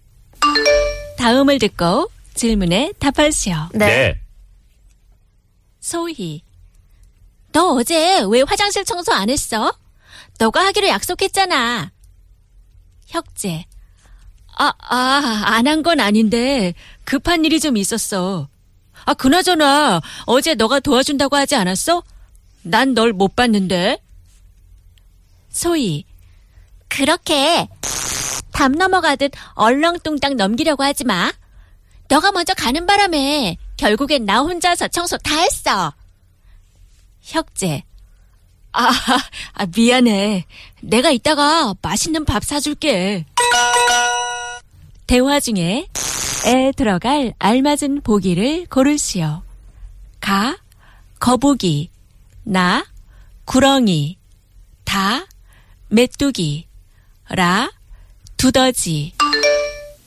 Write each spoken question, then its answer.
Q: 대화 중에 에 들어갈 알맞은 보기를 고르시오.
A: Nah. Gurongi.